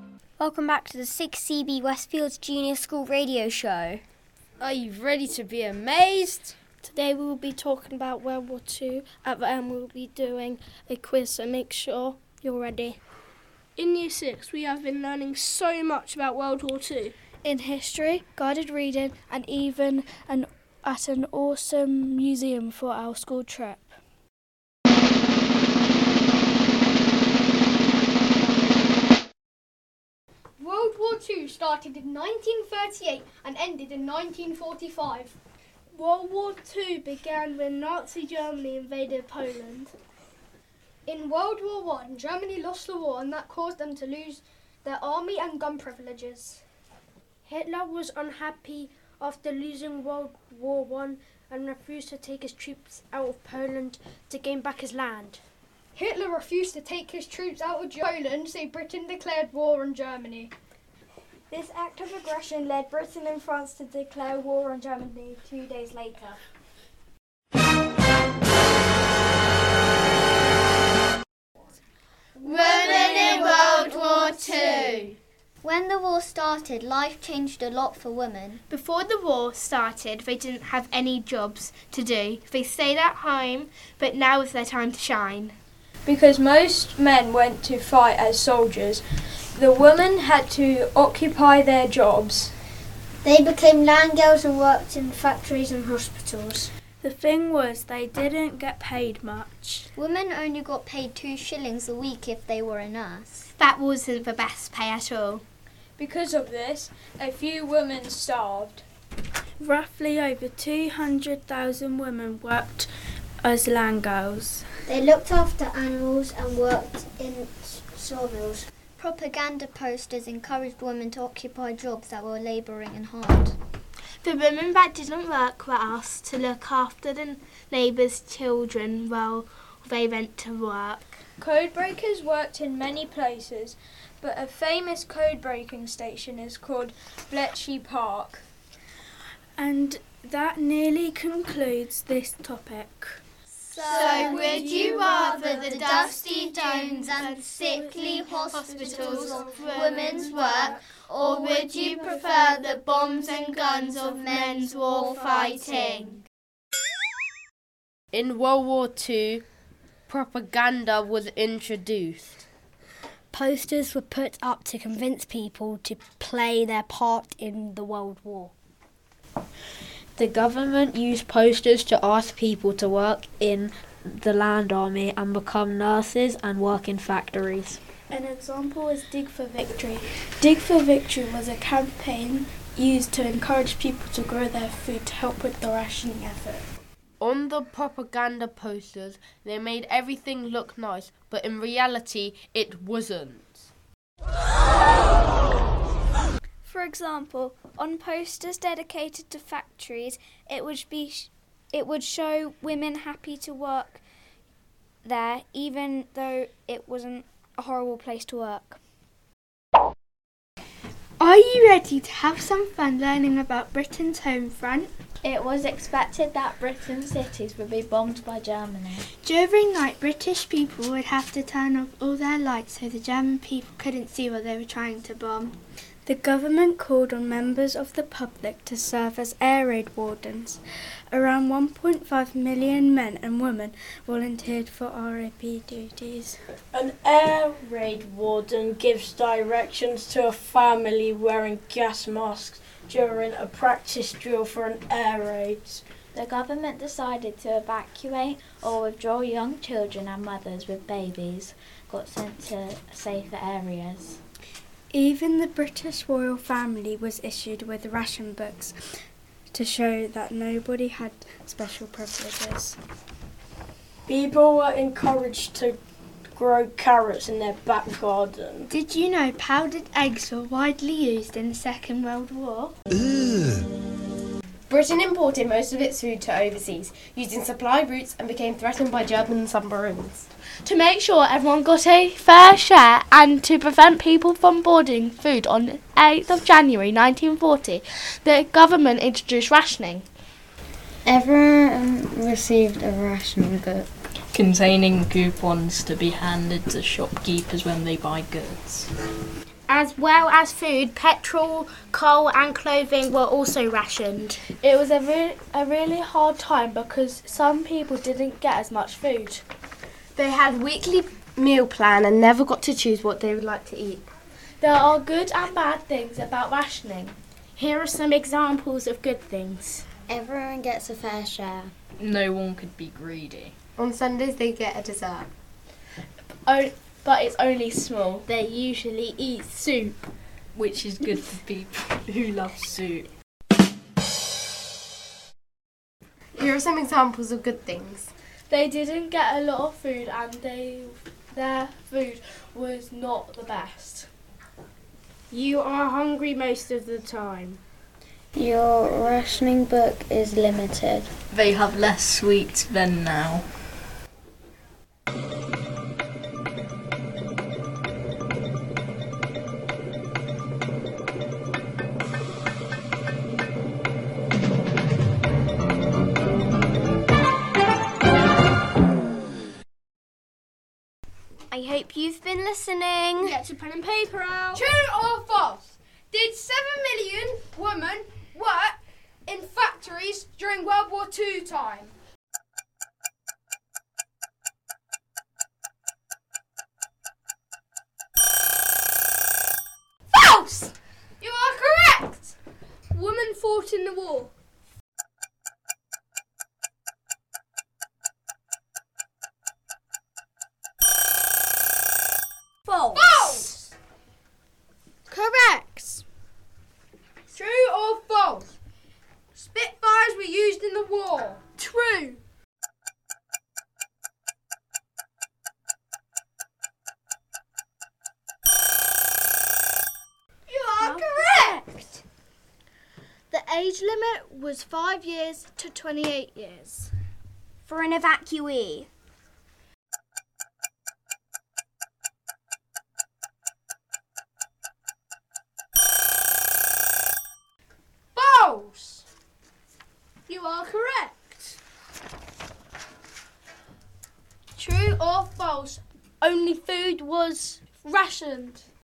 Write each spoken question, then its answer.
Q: True or false? Only food was rationed.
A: False.